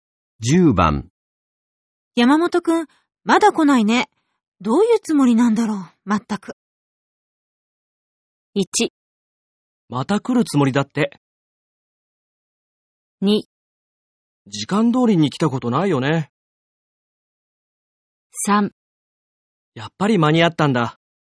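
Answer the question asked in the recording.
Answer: 2: 時間通りに来たことないよね。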